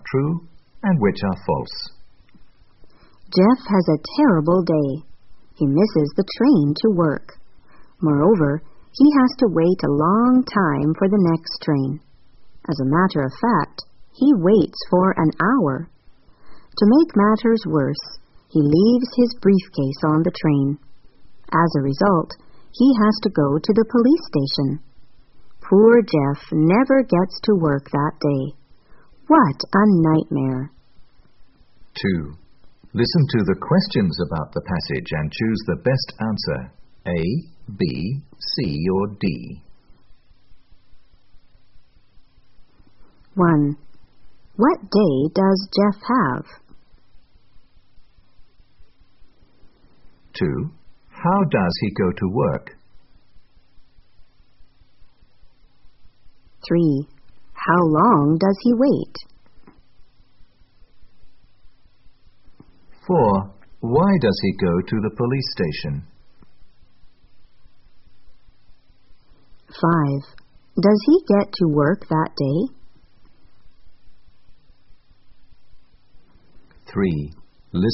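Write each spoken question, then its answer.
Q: What day does Jeff have?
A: A terrible day

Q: How does he go to work?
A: By train

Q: How long does he wait?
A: For an hour

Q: Why does he go to the police station?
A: Because he leaves his briefcase on the train

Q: Does he get to work that day?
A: No, he never gets to work that day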